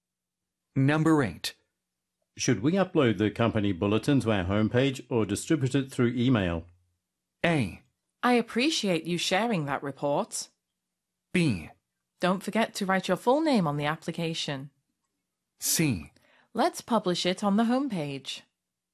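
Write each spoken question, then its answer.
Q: Should we upload the company bulletin to our homepage or distribute it through email?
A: C: Let's publish it on the homepage.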